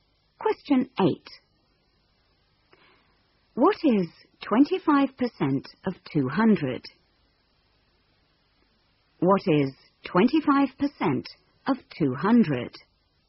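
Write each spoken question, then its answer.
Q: What is 25% of 200?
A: 50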